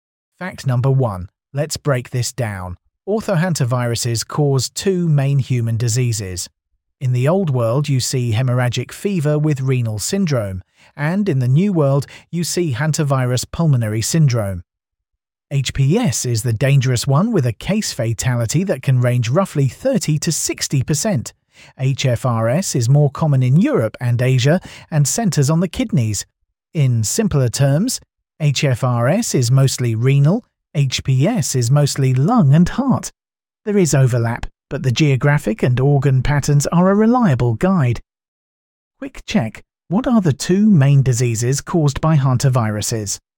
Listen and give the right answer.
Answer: Correct answer, HFRS and HPS.